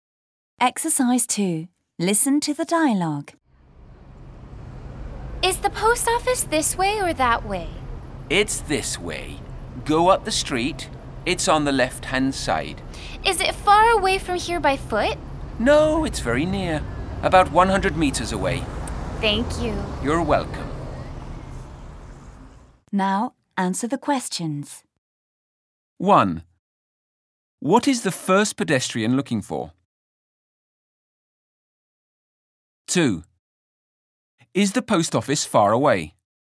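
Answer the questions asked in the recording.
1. The post office
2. No, it's very near, about 100 meters away.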